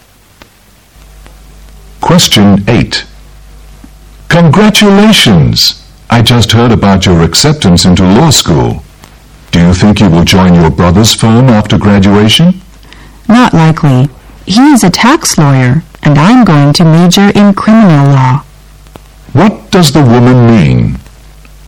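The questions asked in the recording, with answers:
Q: What does the woman mean?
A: She probably won't join her brother's firm, because she will study criminal law and he is a tax lawyer.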